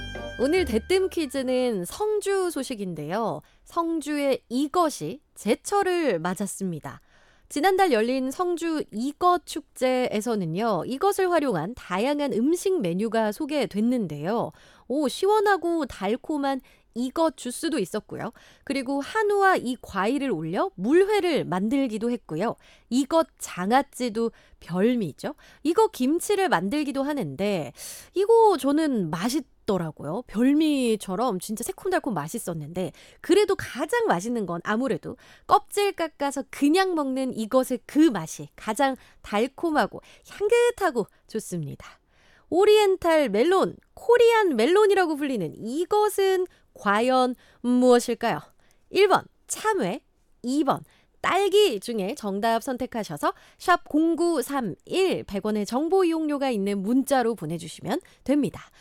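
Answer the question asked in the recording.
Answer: 1번: 참외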